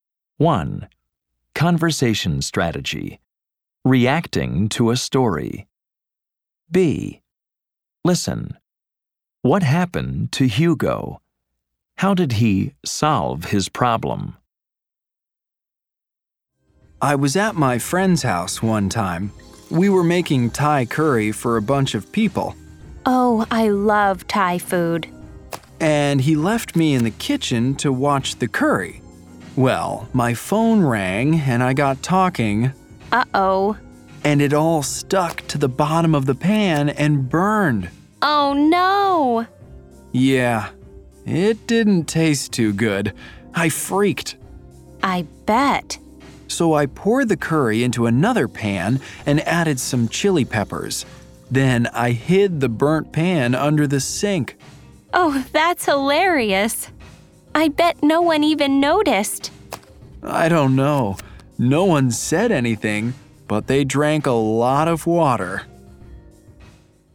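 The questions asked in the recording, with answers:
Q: What happened to Hugo?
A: He was talking on the phone and the curry burned.

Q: How did he solve his problem?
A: He poured the curry into another pan, added chili peppers, and hid the burnt pan under the sink.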